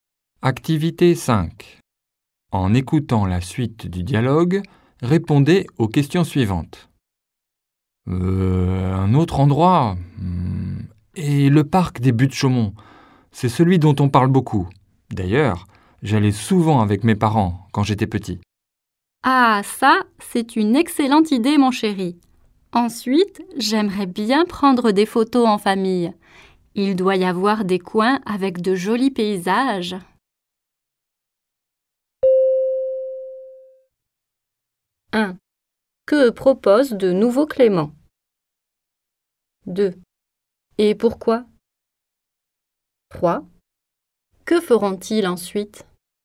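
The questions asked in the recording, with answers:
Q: Que propose de nouveau Clément?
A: Aller au parc des Buttes-Chaumont

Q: Et pourquoi?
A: Il y allait souvent avec ses parents quand il était petit

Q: Que feront-ils ensuite?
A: Prendre des photos en famille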